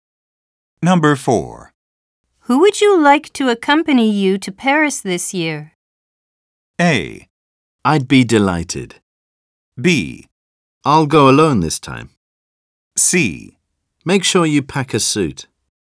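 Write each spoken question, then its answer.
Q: Who would you like to accompany you to Paris this year?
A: B: I'll go alone this time.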